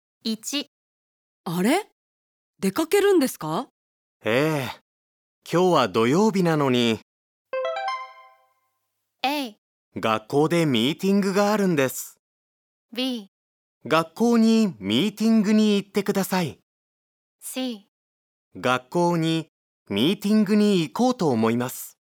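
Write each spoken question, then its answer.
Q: ええ。今日は土曜日なのに。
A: A: 学校でミーティングがあるんです。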